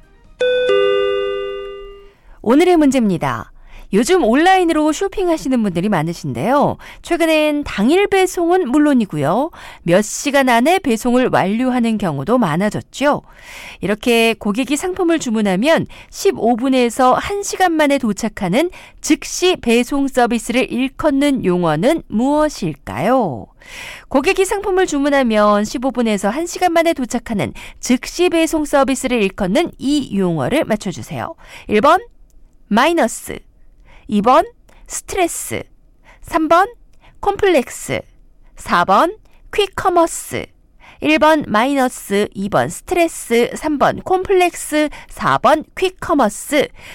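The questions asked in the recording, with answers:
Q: 이렇게 고객이 상품을 주문하면 15분에서 1시간 만에 도착하는 즉시 배송 서비스를 일컫는 용어는 무엇일까요?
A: 4: 퀵커머스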